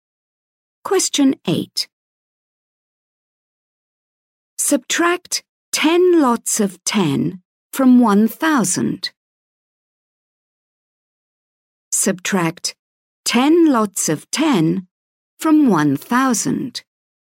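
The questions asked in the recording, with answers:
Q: Subtract 10 lots of 10 from 1,000.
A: 900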